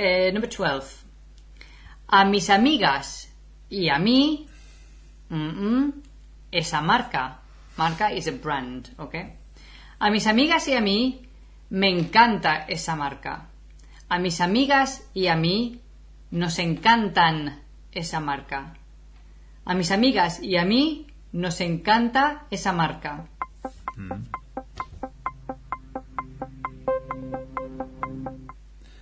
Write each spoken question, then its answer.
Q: A mis amigas y a mí, esa marca.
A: Nos encanta, sí. Letter C.